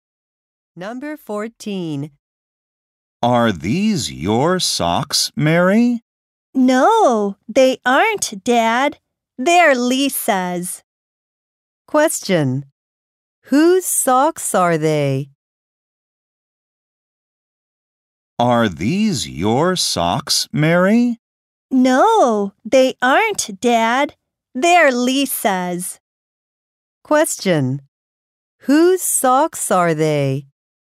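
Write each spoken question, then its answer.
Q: Whose socks are they?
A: Lisa's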